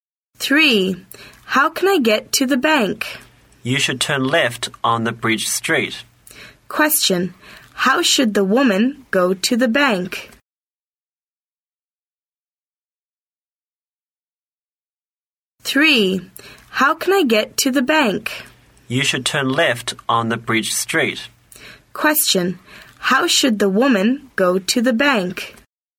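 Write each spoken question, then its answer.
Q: How should the woman go to the bank?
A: Turn left on Bridge Street.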